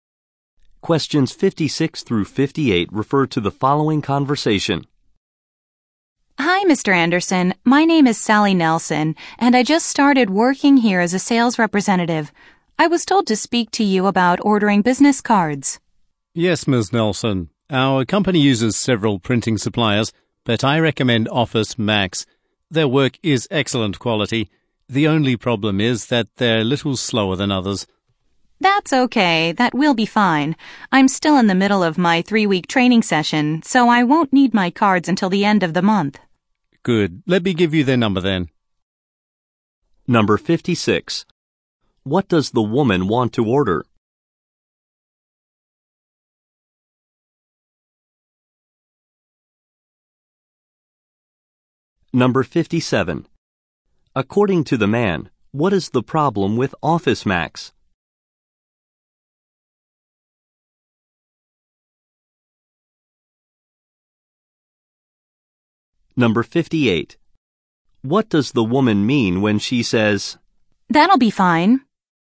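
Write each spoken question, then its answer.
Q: What does the woman want to order?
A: Business cards.

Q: According to the man, what is the problem with Office Max?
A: They are a little slow.

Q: "That'll be fine"?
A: She doesn't need the cards soon.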